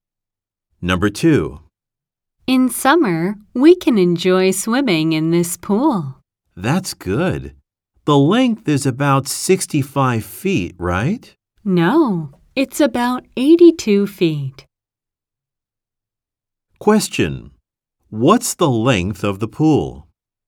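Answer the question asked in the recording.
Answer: about 82 feet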